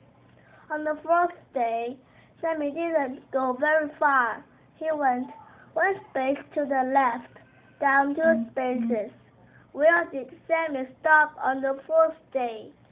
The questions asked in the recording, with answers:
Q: Where did Sammy stop on the fourth day?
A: Sammy went to number 44, then he went down to number